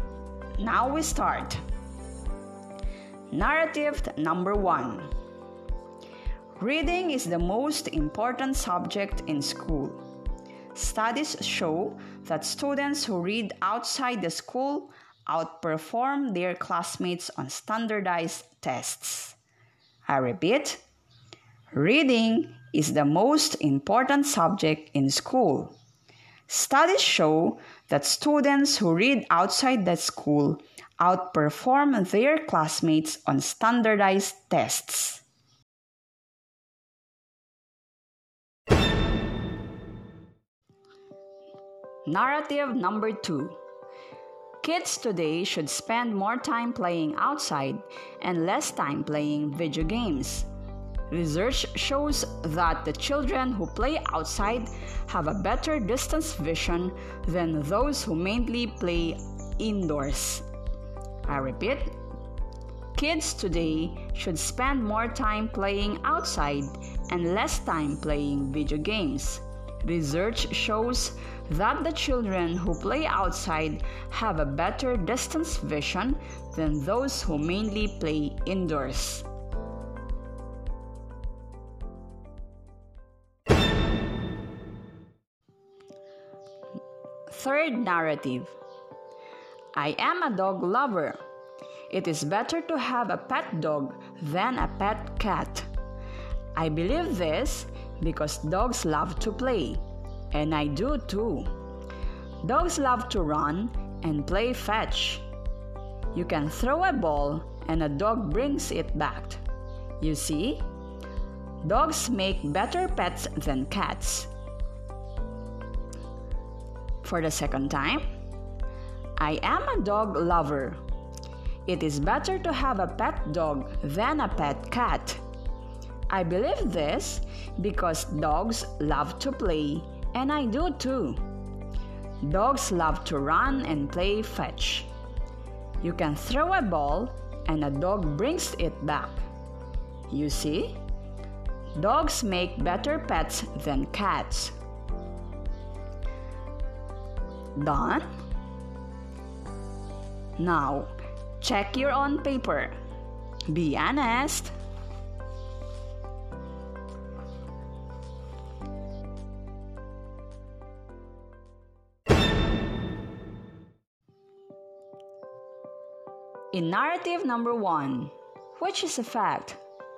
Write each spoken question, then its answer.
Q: In narrative number one, which is a fact?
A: Studies show that students who read outside the school outperform their classmates on standardized tests.